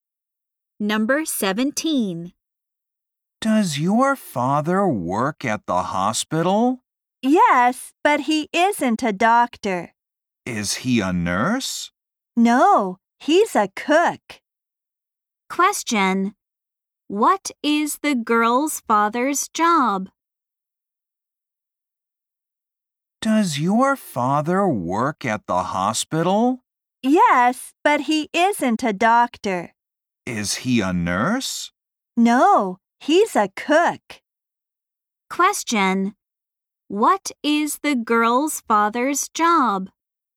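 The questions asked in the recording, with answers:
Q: What is the girl's father's job?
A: He's a cook.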